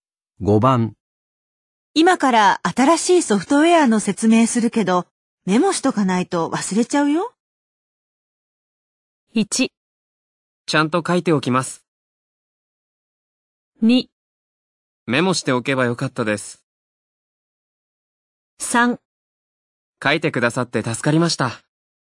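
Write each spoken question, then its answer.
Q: 今から新しいソフトウェアの説明するけど、メモしとかないと忘れちゃうよ。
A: 1: ちゃんと書いておきます。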